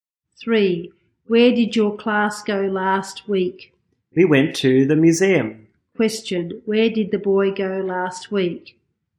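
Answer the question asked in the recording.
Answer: The museum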